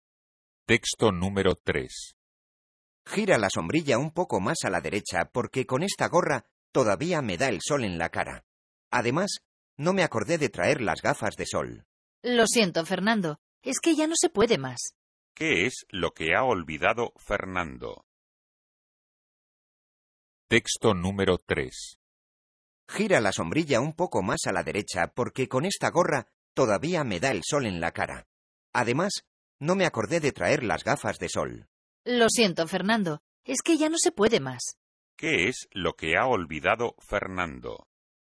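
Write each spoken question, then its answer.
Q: ¿Qué es lo que ha olvidado Fernando?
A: Las gafas de sol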